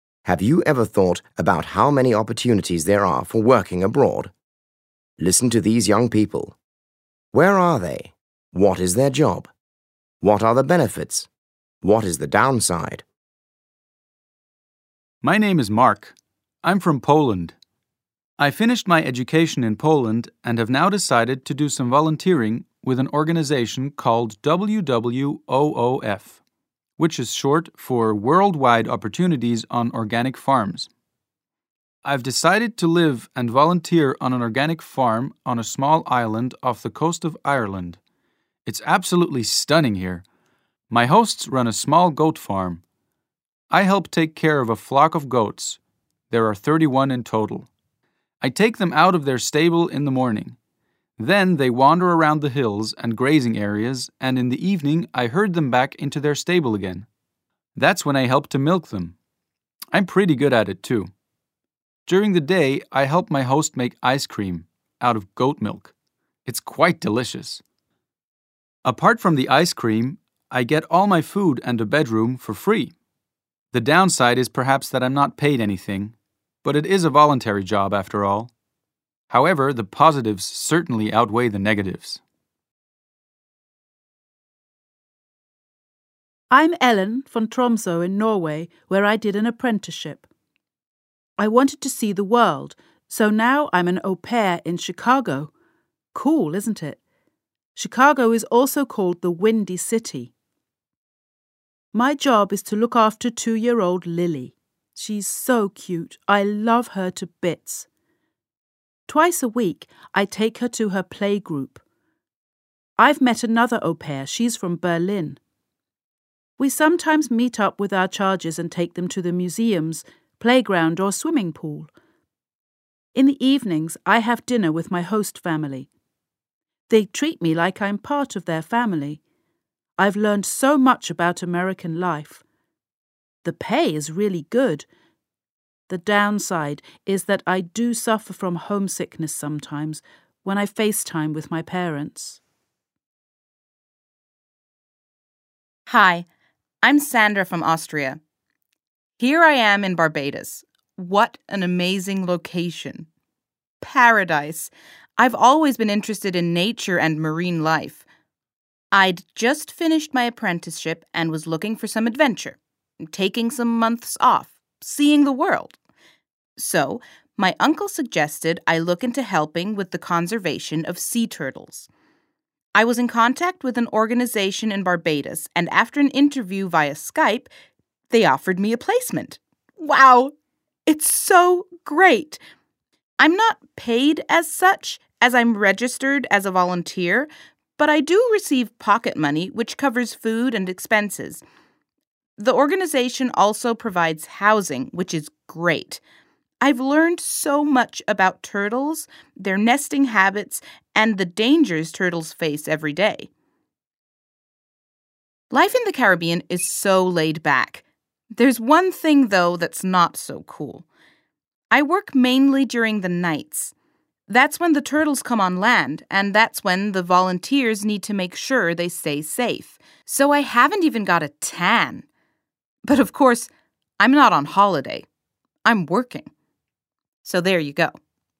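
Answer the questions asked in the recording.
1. Mark: on a small island off the coast of Ireland; Ellen: Chicago; Sandra: Barbados
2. Mark: volunteer on an organic goat farm; Ellen: au pair looking after 2-year-old Lily; Sandra: volunteer helping conserve sea turtles
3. Mark: free food and bedroom; Ellen: good pay, treated like family, learns about American life; Sandra: pocket money, free housing, learns about turtles
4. Mark: not paid; Ellen: homesickness; Sandra: works mainly at night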